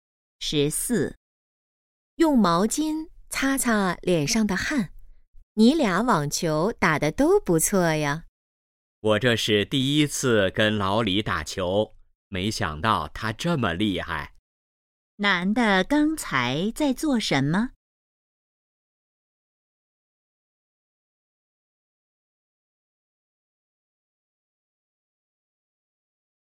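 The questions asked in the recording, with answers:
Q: 男的刚才在做什么?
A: 打网球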